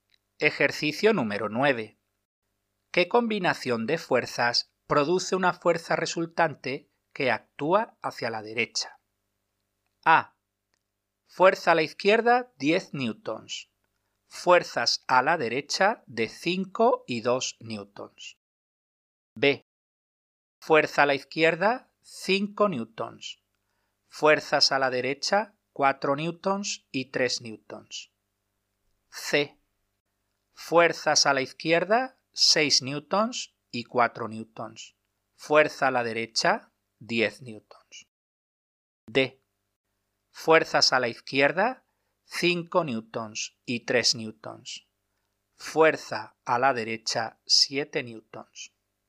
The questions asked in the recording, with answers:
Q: ¿Qué combinación de fuerzas produce una fuerza resultante que actúa hacia la derecha?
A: La respuesta correcta es la B, puesto que produce una fuerza resultante de 4 más 3, 7 menos 5 igual a 2 newtons hacia la derecha.